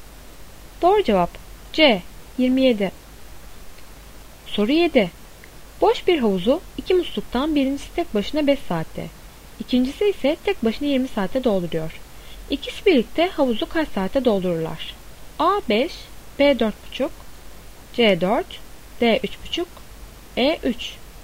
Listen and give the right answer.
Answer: Doğru cevap C 4.